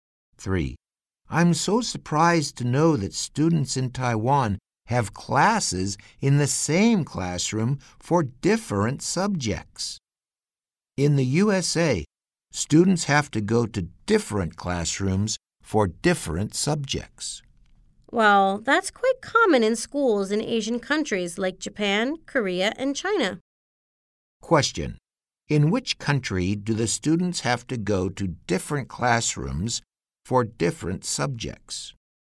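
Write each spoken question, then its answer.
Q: In which country do the students have to go to different classrooms for different subjects?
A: The USA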